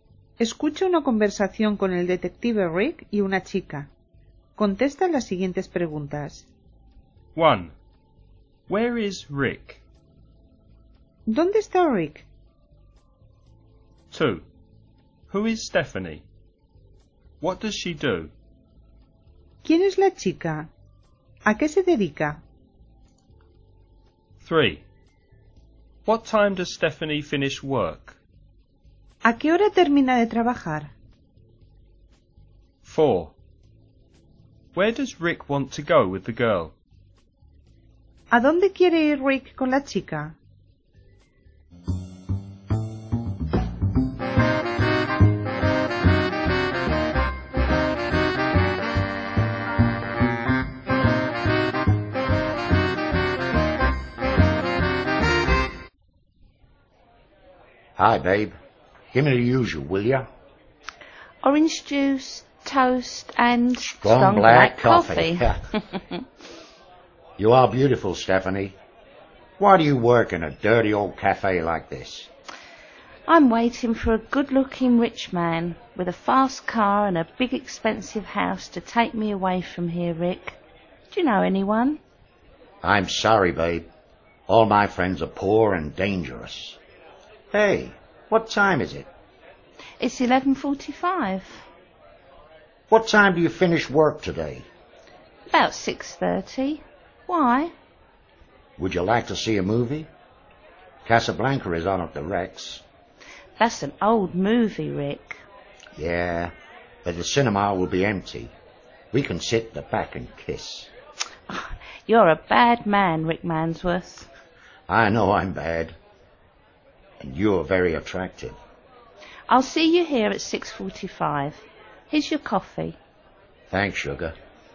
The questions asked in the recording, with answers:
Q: Where is Rick?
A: He's in a cafe.

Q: Who is Stephanie? What does she do?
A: She's a waitress.

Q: What time does Stephanie finish work?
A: About 6:30.

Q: Where does Rick want to go with the girl?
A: To the cinema.